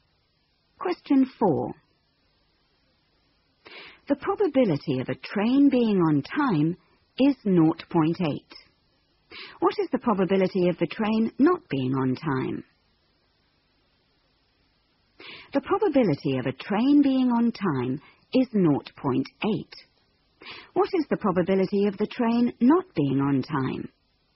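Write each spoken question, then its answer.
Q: What is the probability of the train not being on time?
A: 0.2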